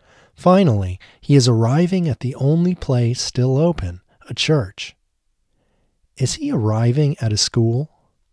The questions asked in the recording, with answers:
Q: Is he arriving at a school?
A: No, he isn't arriving at a school.